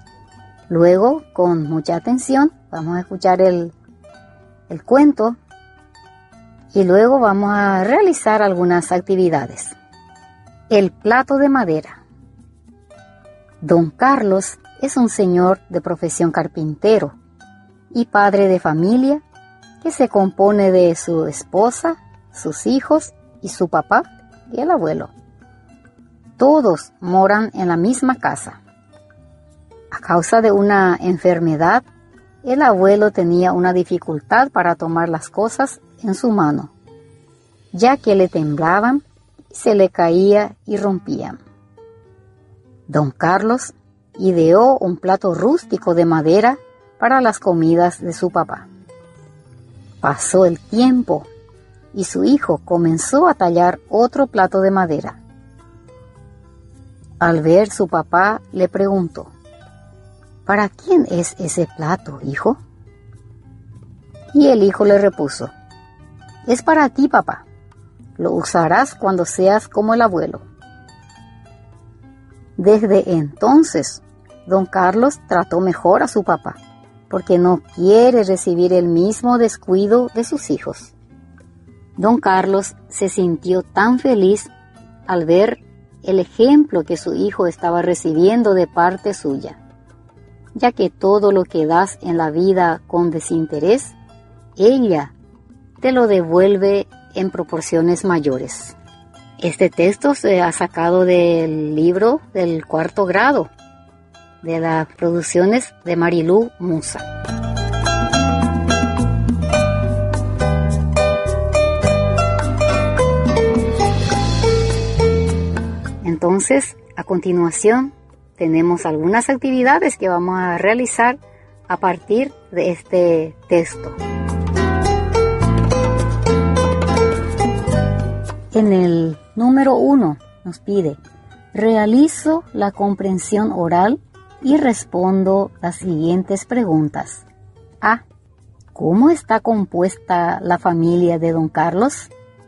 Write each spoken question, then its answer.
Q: ¿Cómo está compuesta la familia de don Carlos?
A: Está don Carlos, su esposa, sus hijos, su papá.